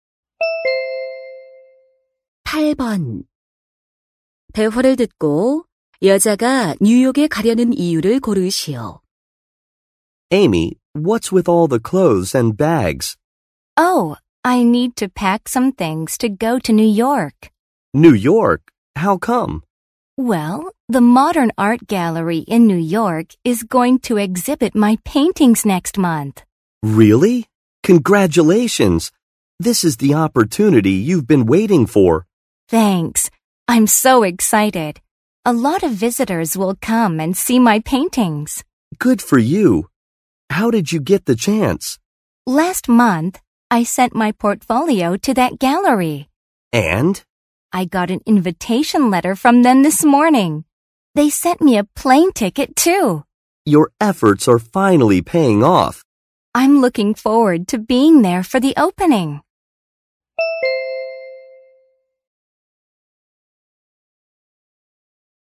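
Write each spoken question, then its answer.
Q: 대화를 듣고 여자가 뉴욕에 가려는 이유를 고르시오.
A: 자신의 그림 전시회에 참석하려고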